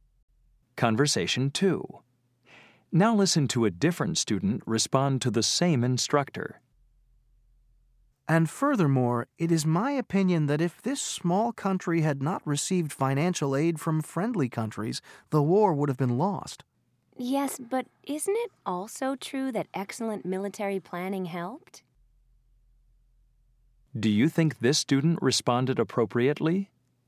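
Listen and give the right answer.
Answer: yes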